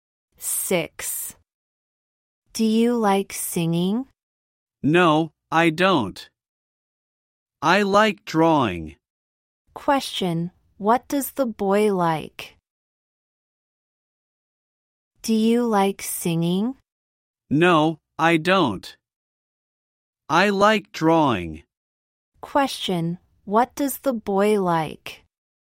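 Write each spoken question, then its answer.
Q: Question, what does the boy like?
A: Drawing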